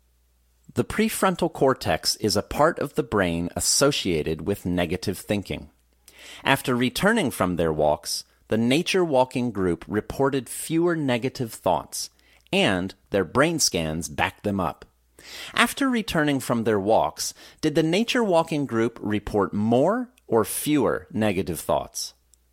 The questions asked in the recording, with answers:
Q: After returning from their walks, did the nature walking group report more or fewer negative thoughts?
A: After returning from their walks, the nature walking group reported fewer negative thoughts.